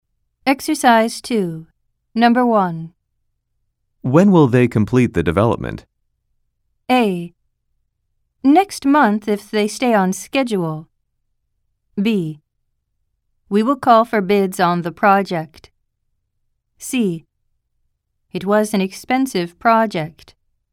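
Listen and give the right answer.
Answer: A: Next month if they stay on schedule.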